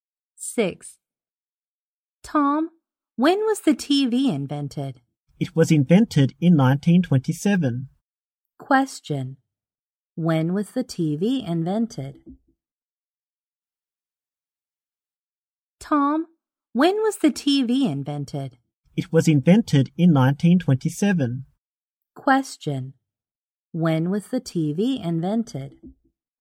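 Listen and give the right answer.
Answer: In 1927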